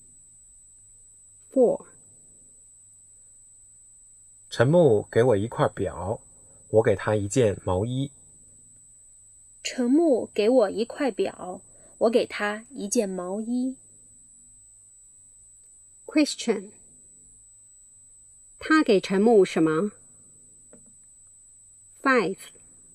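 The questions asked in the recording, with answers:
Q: 他给陈木什么?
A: 一件毛衣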